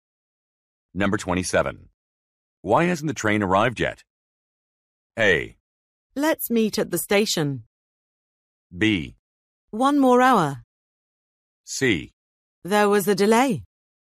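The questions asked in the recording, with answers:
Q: Why hasn't the train arrived yet?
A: C: There was a delay.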